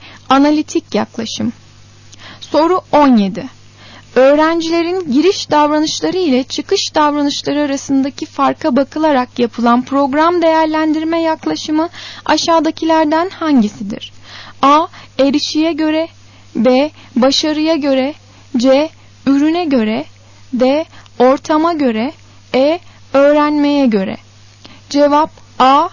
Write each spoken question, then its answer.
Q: Öğrencilerin giriş davranışları ile çıkış davranışları arasındaki farka bakılarak yapılan program değerlendirme yaklaşımı aşağıdakilerden hangisidir?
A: Cevap A. Erişiye göre.